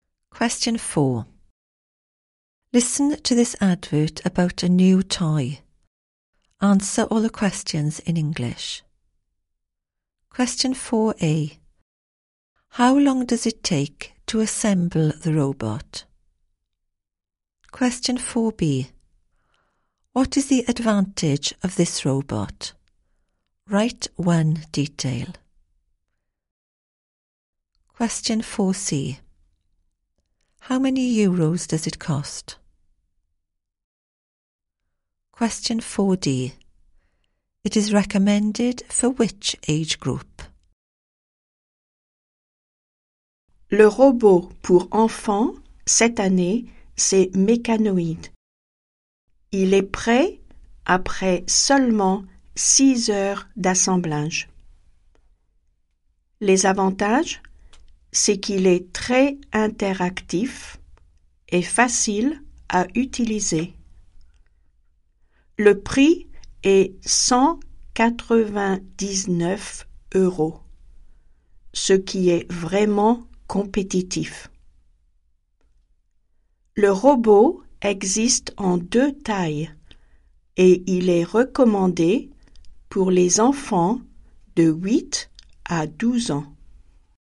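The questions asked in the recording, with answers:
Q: How long does it take to assemble the robot?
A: 6 hours

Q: What is the advantage of this robot?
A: Very interactive / easy to use

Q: How many euros does it cost?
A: 199 euros

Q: It is recommended for which age group?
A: Children aged 8 to 12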